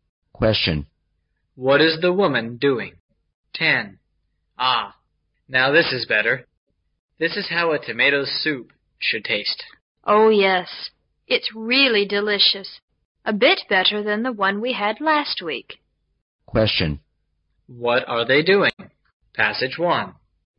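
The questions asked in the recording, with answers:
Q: What are they doing?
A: Eating tomato soup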